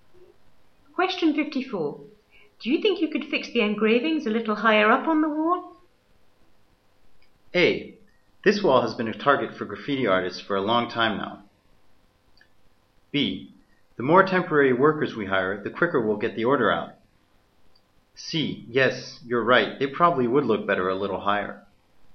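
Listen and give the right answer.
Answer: C: Yes, you're right. It probably would look better a little higher.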